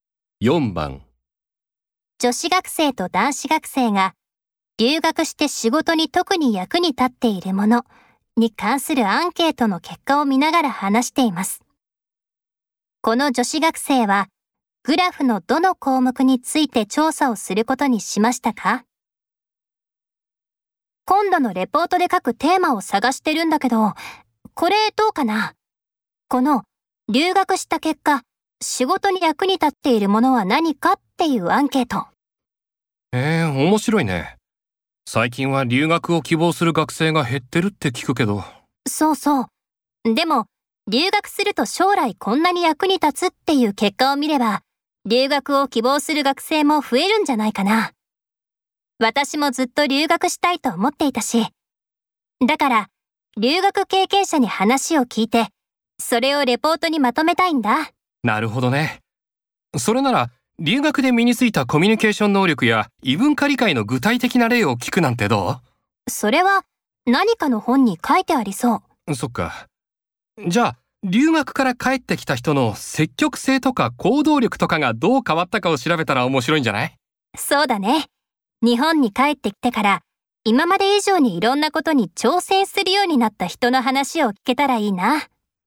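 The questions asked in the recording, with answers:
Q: この女子学生はグラフのどの項目について調査をすることにしましたか?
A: 積極性・行動力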